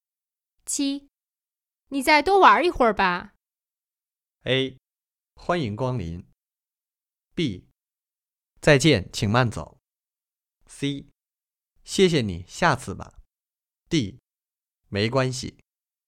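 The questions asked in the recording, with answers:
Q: 你再多玩一会儿吧。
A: C: 谢谢你,下次吧。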